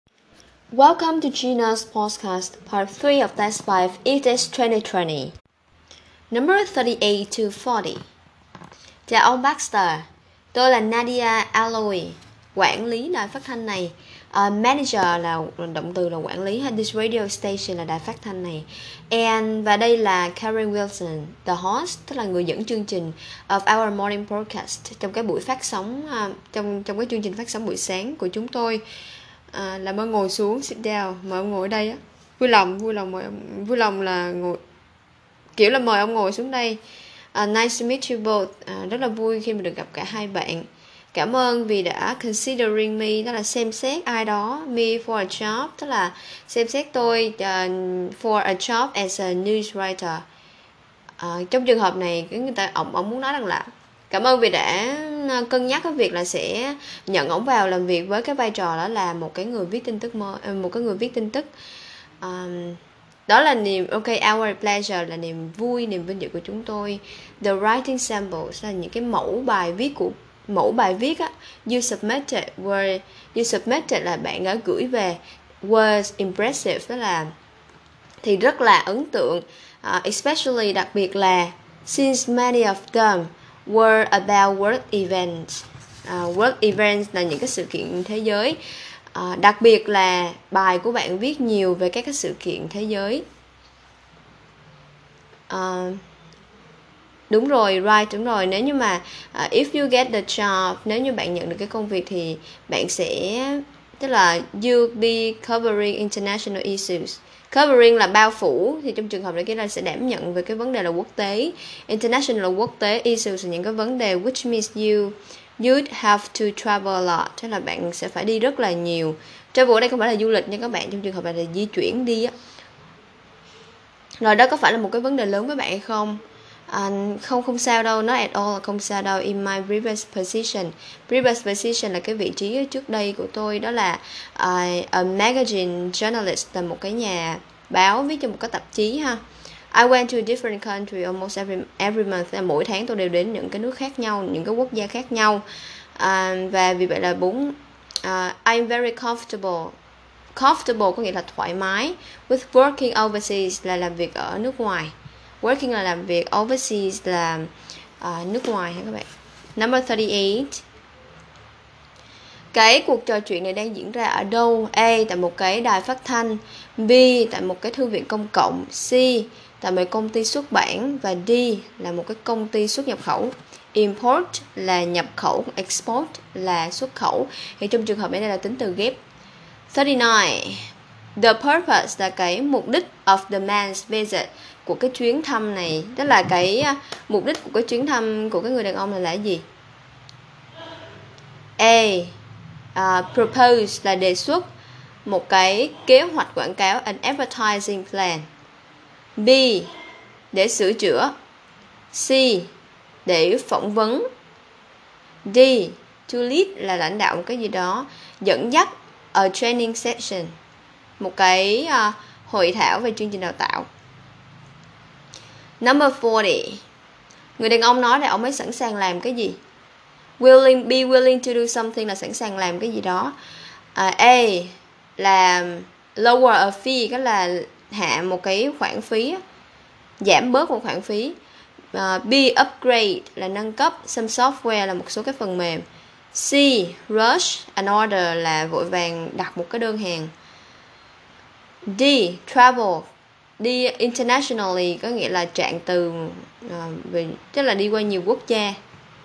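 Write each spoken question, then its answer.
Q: Cái cuộc trò chuyện này đang diễn ra ở đâu?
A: A: Tại một cái đài phát thanh.

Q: The purpose là cái mục đích of the man's visit, của cái chuyến thăm này, đó là cái mục đích của cái chuyến thăm của cái người đàn ông là gì?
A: C: Để phỏng vấn.

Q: Người đàn ông nói là ông ấy sẵn sàng làm cái gì?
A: D: Travel. Đi internationally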